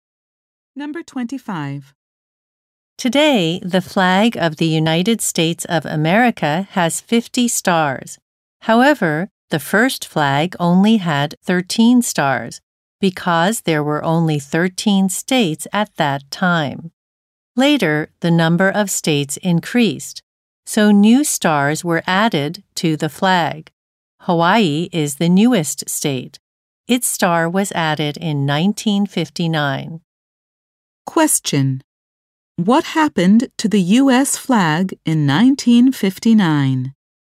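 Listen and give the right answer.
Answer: Hawaii's star was added to it.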